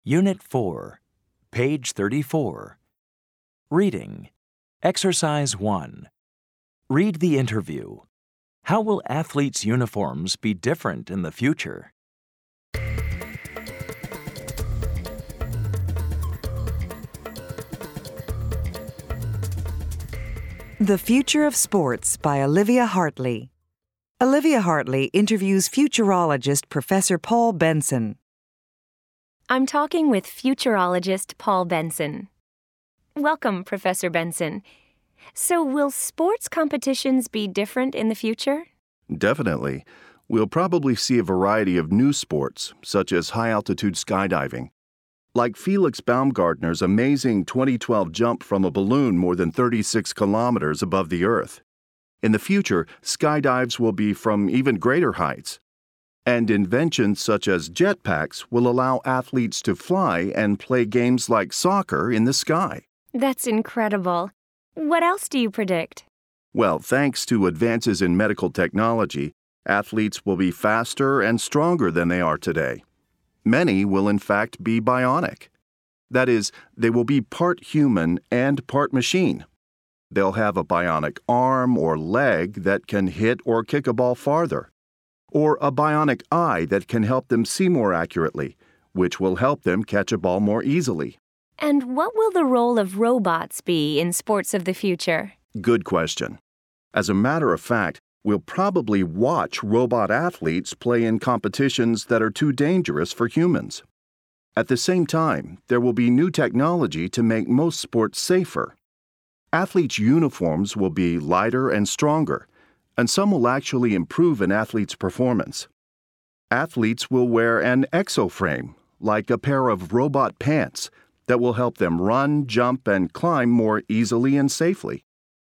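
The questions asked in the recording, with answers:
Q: How will athletes' uniforms be different in the future?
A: They will be lighter and stronger, and some will improve an athlete's performance.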